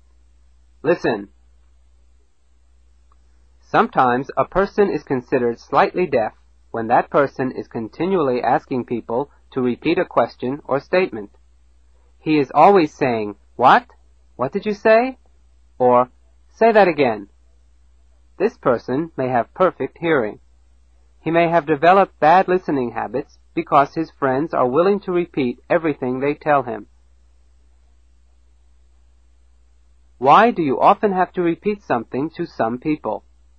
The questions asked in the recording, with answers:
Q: Why do you often have to repeat something to some people?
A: Because they do not listen the first time.